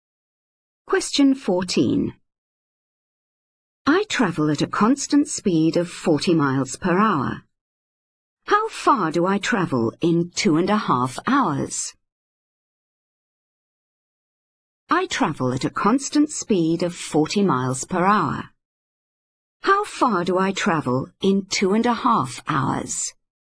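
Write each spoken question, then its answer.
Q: How far do I travel in 2.5 hours?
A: 100 miles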